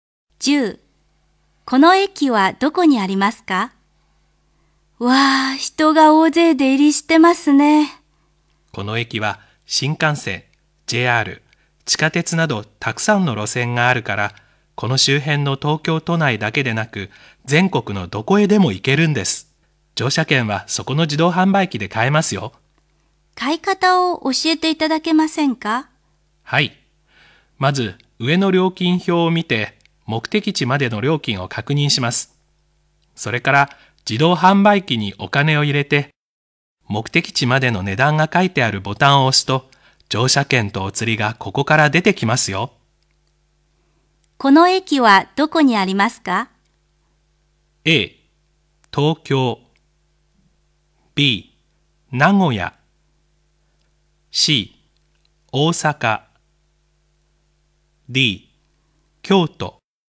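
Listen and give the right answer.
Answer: A: 東京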